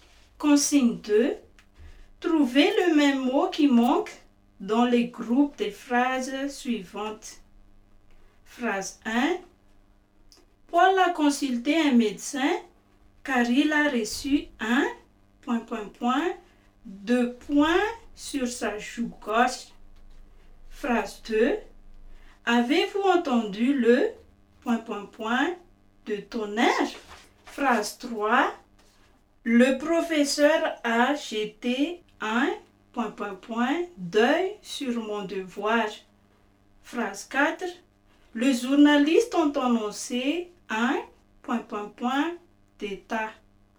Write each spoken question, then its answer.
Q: Trouvez le même mot qui manque dans les groupes des phrases suivantes.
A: Le mot qui manque est alors coup.